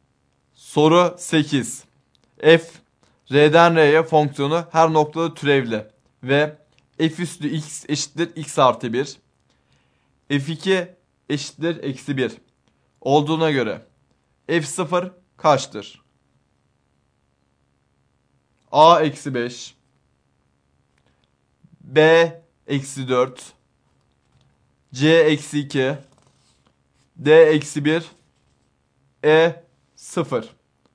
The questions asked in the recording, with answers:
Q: F2 eşittir eksi 1 olduğuna göre F0 kaçtır?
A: Doğru yanıt A şıkkı.